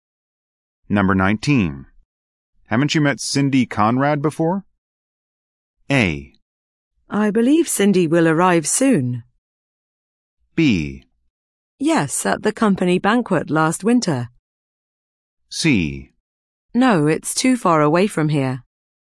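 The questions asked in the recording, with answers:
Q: Haven't you met Cindy Conrad before?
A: B: Yes, at the company banquet last winter.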